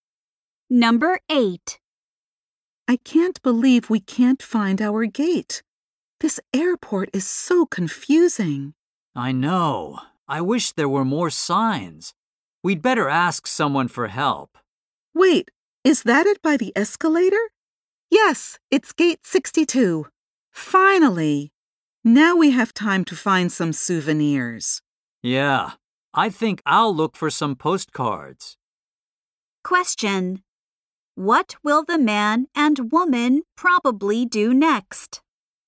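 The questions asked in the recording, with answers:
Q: What will the man and woman probably do next?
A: Look for souvenirs.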